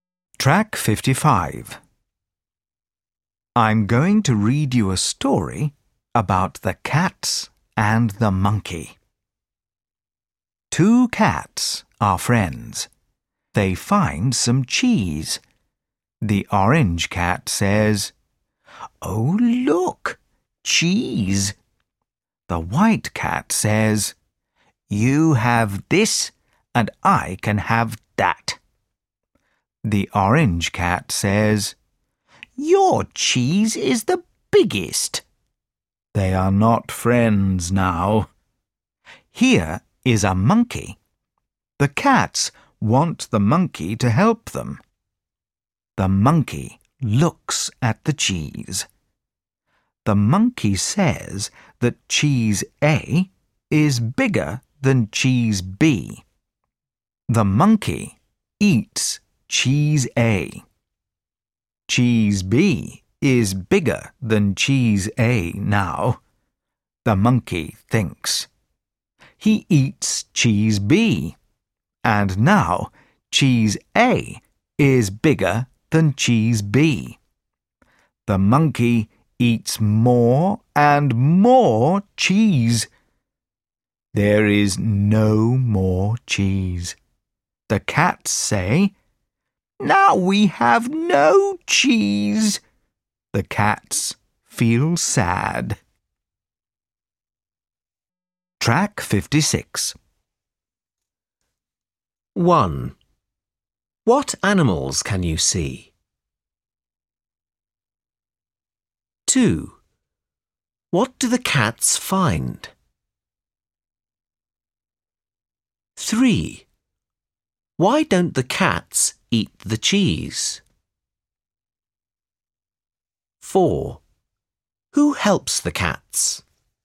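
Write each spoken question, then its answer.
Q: What animals can you see?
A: Cats and a monkey

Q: What do the cats find?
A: Some cheese

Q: Who helps the cats?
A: A monkey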